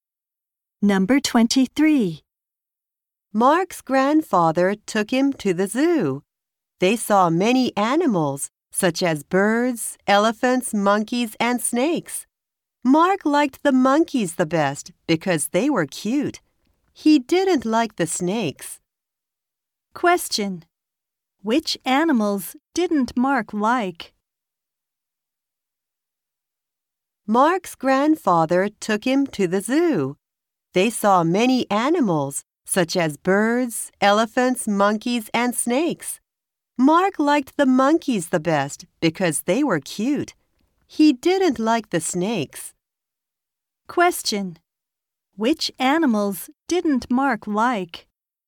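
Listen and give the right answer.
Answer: The snakes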